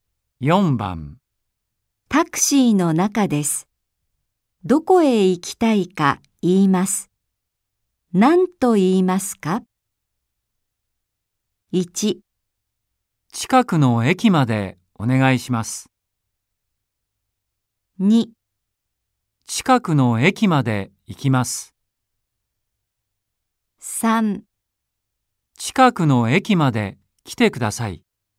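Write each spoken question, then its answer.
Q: タクシーの中です。どこへ行きたいか言います。何と言いますか ?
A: 1: 近くの駅までお願いします。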